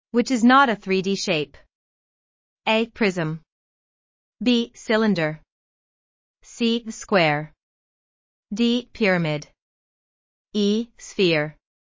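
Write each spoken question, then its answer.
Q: which is not a 3D shape. A. Prism. B. Cylinder. C. Square. D. Pyramid. E. Sphere.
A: C: Square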